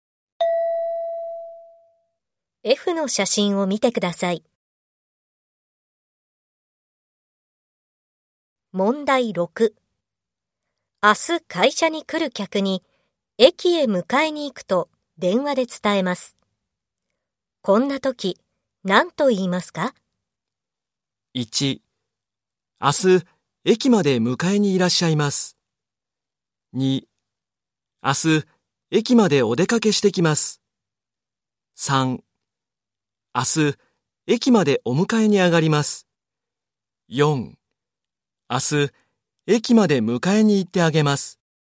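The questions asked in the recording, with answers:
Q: 明日会社に来る客に駅へ迎えに行くと電話で伝えます。こんな時、何と言いますか?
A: 4: 明日駅までお迎えに上がります。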